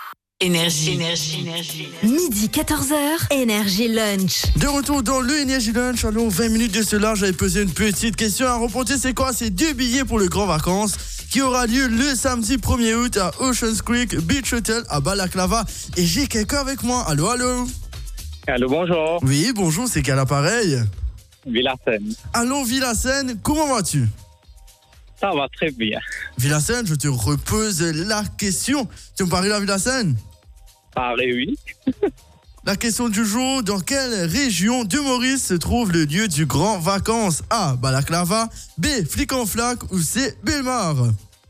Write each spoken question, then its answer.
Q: La question du jour, dans quelle région de Maurice se trouve le lieu du Grand Vacances?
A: Balaclava.